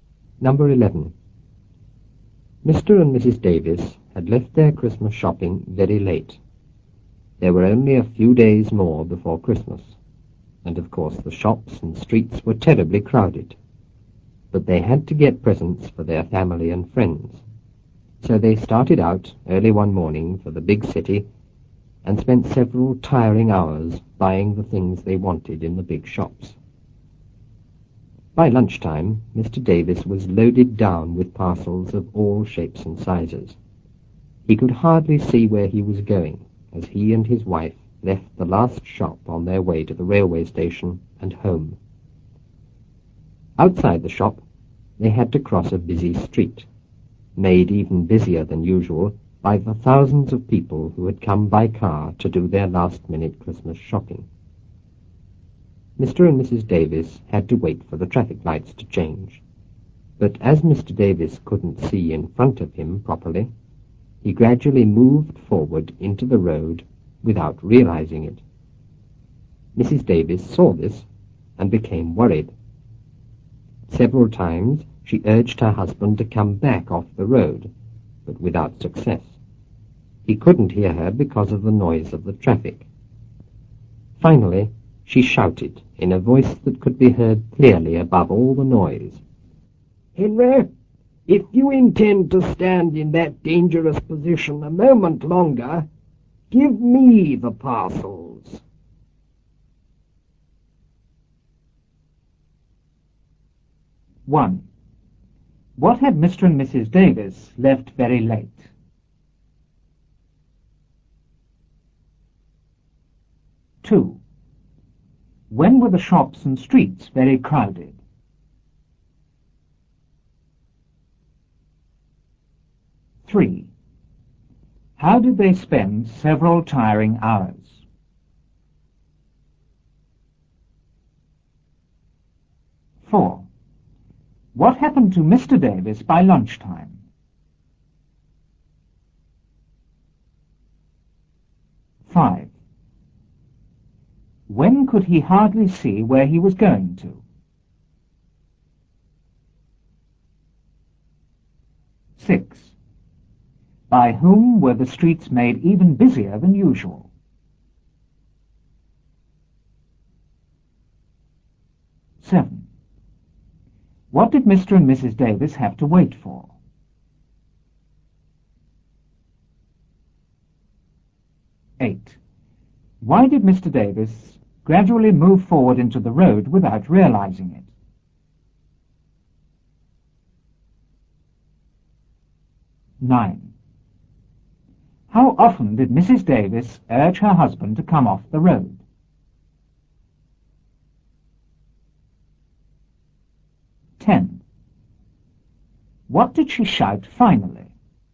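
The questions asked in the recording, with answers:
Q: What had Mr. and Mrs. Davis left very late?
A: Their Christmas shopping

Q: When were the shops and streets very crowded?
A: A few days before Christmas

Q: How did they spend several tiring hours?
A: Buying the things they wanted in the big shops

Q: What happened to Mr. Davis by lunchtime?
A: He was loaded down with parcels of all shapes and sizes

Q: When could he hardly see where he was going to?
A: As he and his wife left the last shop on their way to the station

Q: By whom were the streets made even busier than usual?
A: By thousands of people who had come by car to do last-minute Christmas shopping

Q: What did Mr. and Mrs. Davis have to wait for?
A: The traffic lights to change

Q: Why did Mr. Davis gradually move forward into the road without realizing it?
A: Because he couldn't see in front of him properly

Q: How often did Mrs. 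Davis urge her husband to come off the road?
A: Several times

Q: What did she shout finally?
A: "Henry, if you intend to stand in that dangerous position a moment longer, give me the parcels."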